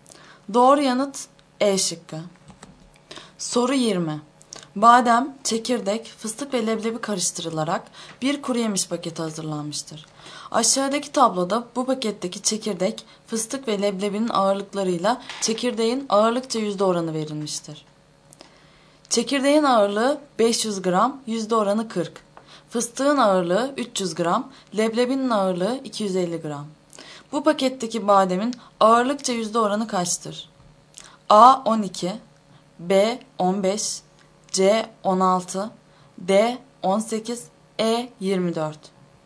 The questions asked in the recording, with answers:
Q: Bu paketteki bademin ağırlıkça yüzde oranı kaçtır?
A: Doğru yanıt C şıkkı.